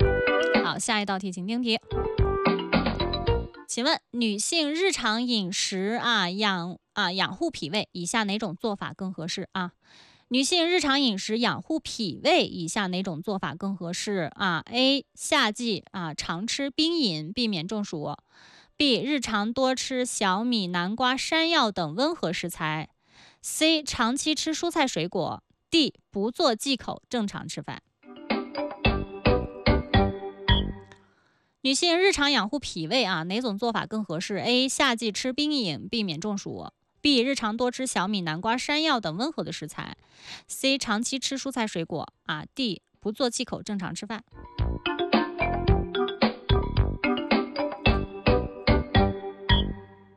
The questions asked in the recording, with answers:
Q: 请问女性日常饮食啊,养护脾胃,以下哪种做法更合适啊?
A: B 就是正确答案。